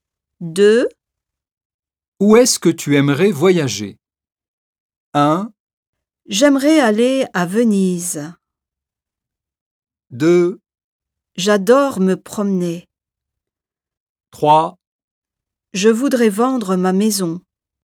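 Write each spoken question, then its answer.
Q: Où est-ce que tu aimerais voyager?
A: 1: J'aimerais aller à Venise.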